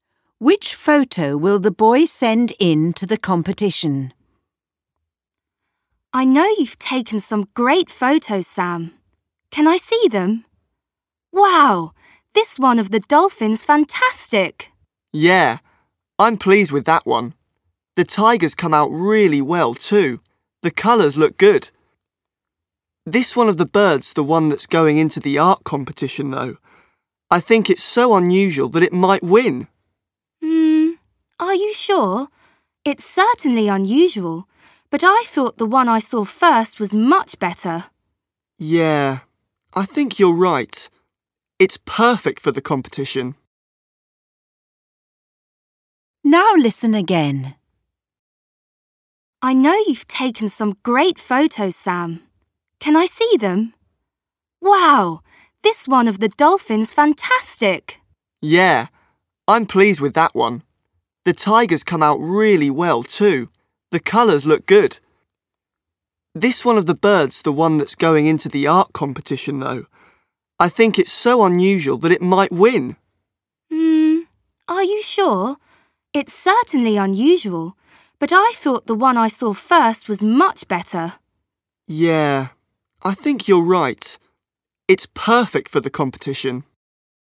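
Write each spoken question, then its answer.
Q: Which photo will the boy send in to the competition?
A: The photo of the dolphin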